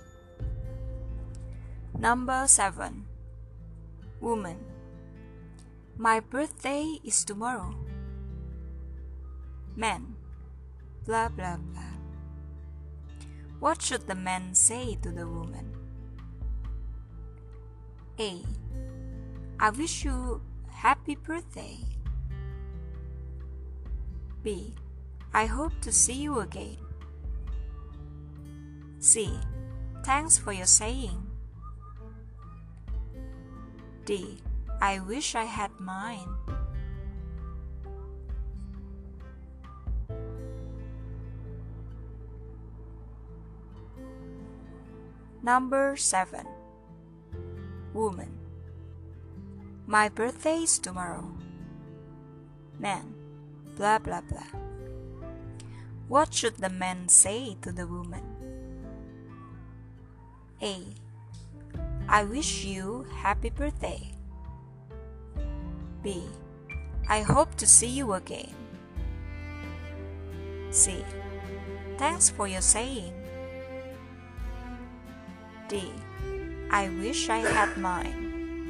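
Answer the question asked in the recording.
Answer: A: I wish you happy birthday.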